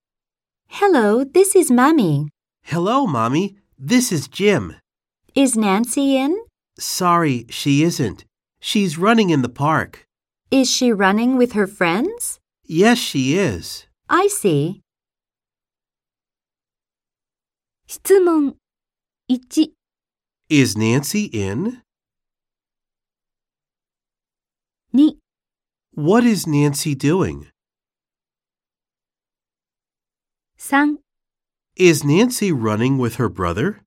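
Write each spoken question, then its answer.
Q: Is Nancy in?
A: No, she isn't.

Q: What is Nancy doing?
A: She's running in the park.

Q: Is Nancy running with her brother?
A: No, she is running with her friends.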